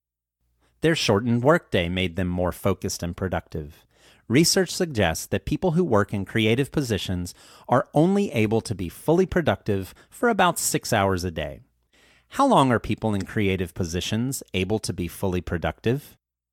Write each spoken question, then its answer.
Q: How long are people in creative positions able to be fully productive?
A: People in creative positions are only able to be fully productive for about 6 hours a day.